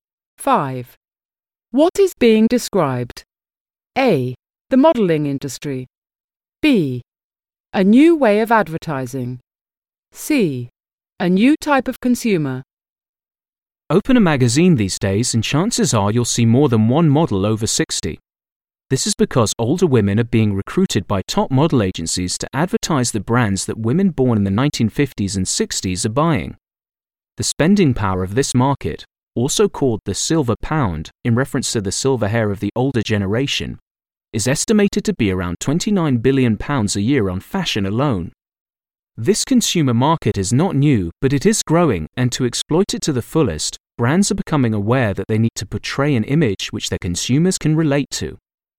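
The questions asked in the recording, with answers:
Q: What is being described?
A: C: A new type of consumer.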